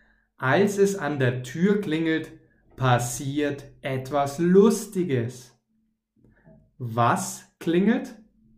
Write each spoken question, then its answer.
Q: Was klingelt?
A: Die Tür. Es klingelt an der Tür.